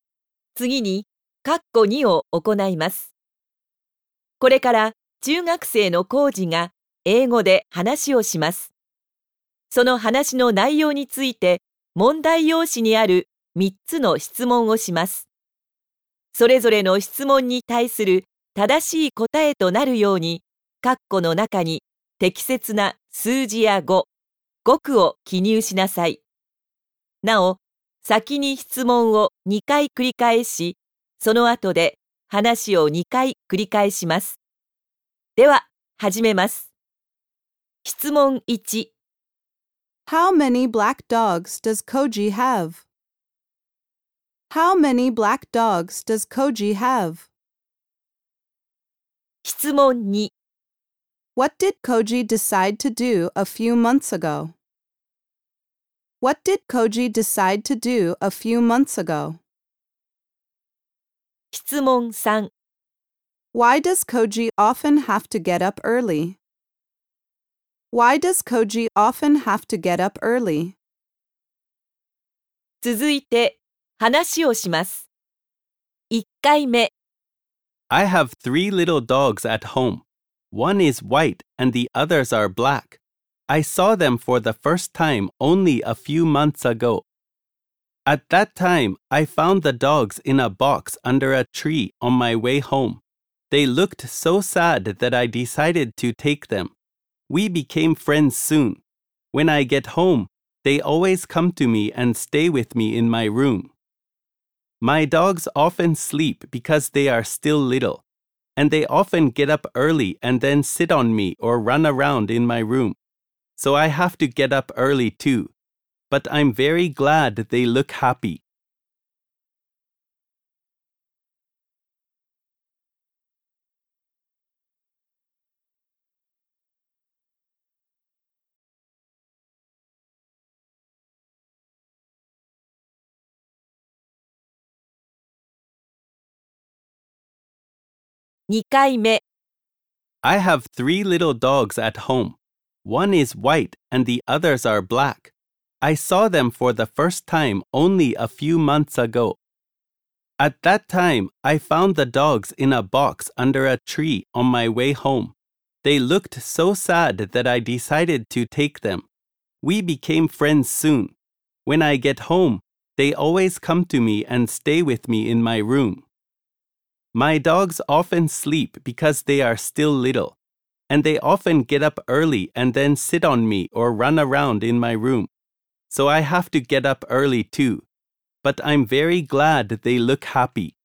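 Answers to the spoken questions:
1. Two
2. To take the dogs home
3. Because his dogs get up early and sit on him or run around his room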